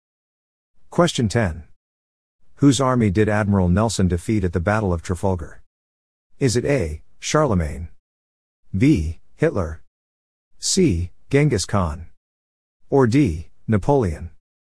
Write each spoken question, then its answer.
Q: Whose army did Admiral Nelson defeat at the Battle of Trafalgar?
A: The answer is D. Napoleon.